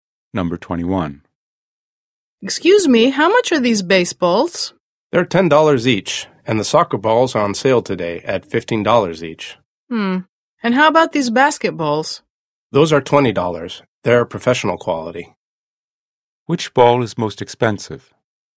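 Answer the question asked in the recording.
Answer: The basketball ($20)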